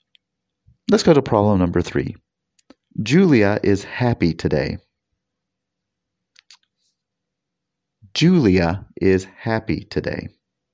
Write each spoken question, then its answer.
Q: Julia is happy today.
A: Did you choose happy? Great.